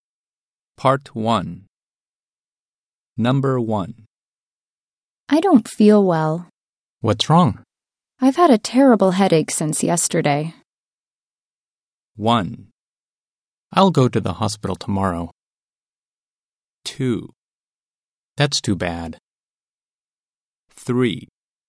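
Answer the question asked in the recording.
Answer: 2: That's too bad.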